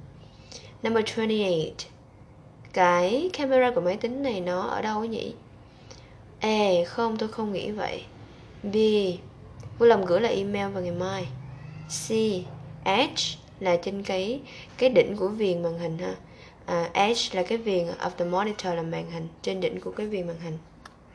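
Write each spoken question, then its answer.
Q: Cái camera của máy tính này nó ở đâu nhỉ?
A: C: Trên đỉnh của viền màn hình.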